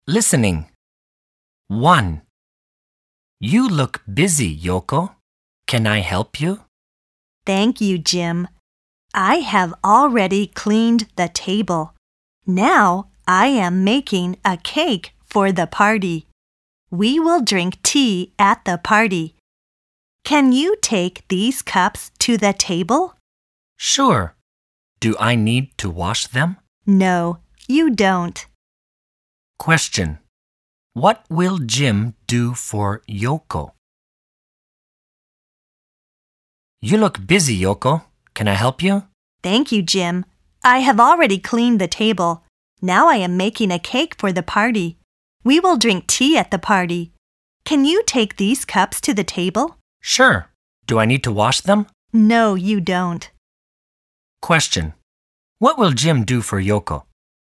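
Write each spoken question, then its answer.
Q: What will Jim do for Yoko?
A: Take the cups to the table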